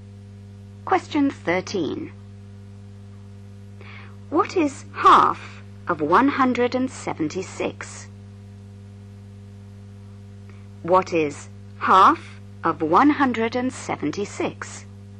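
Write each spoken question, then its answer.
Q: What is half of 176?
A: 88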